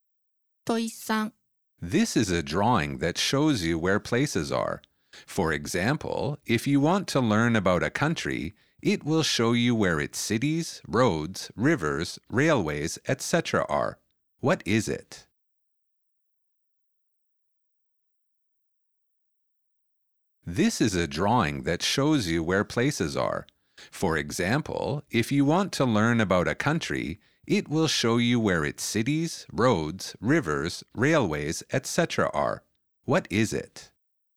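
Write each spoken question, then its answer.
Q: What is it?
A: a map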